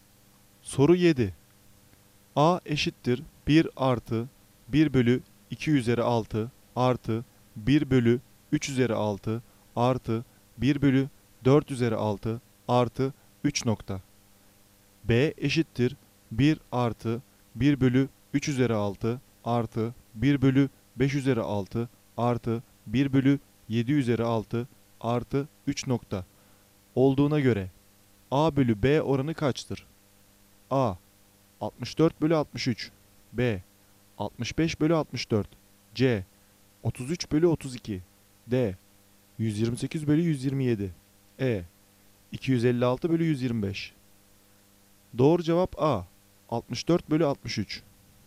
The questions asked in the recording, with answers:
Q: A eşittir 1 artı 1 bölü 2 üzeri 6 artı 1 bölü 3 üzeri 6 artı 1 bölü 4 üzeri 6 artı 3 B eşittir 1 artı 1 bölü 3 üzeri 6 artı 1 bölü 5 üzeri 6 artı 1 bölü 7 üzeri 6 artı 3 olduğuna göre A bölü B oranı kaçtır?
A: Doğru cevap A 64 bölü 63.